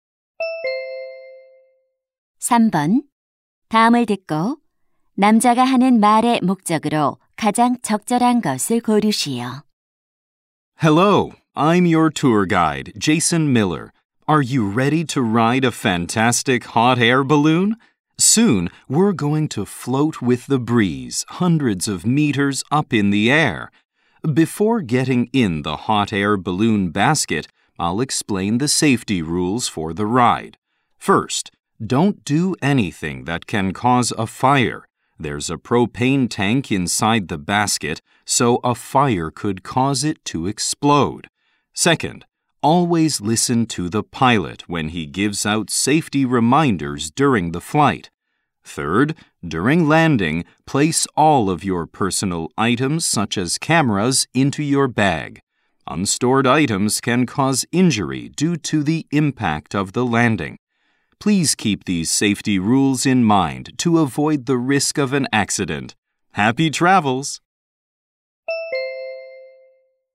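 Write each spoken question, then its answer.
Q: 다음을 듣고 남자가 하는 말의 목적으로 가장 적절한 것을 고르시오.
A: 열기구 탑승 안전 수칙을 설명하려고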